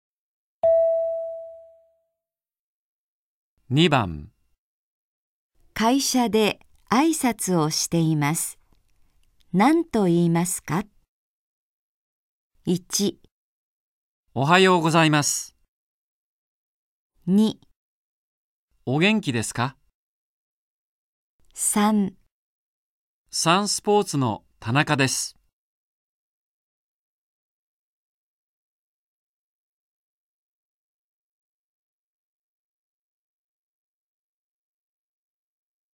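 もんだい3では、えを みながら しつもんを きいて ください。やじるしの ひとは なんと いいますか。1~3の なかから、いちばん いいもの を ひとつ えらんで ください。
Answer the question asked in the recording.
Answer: おはようございます。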